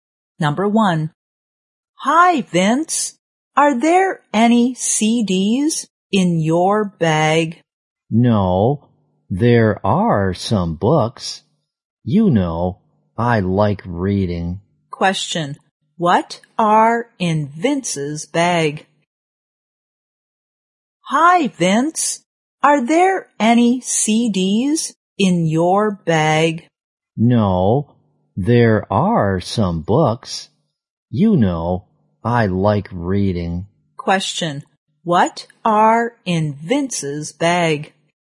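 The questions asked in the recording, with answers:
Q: What are in Vince's bag?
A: Some books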